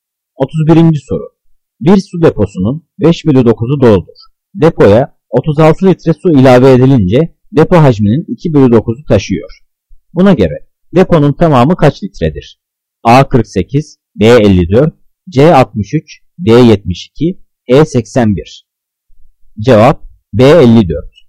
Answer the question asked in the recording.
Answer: Cevap B54.